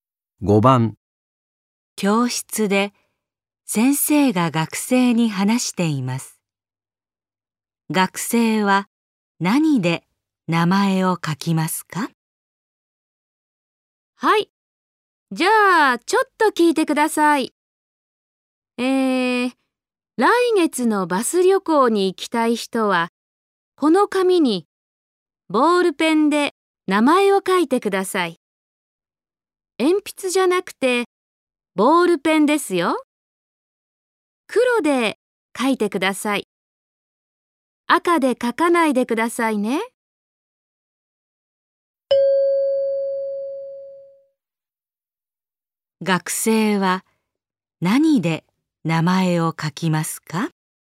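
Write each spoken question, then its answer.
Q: 学生は何で名前を書きますか?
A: 黒いボールペン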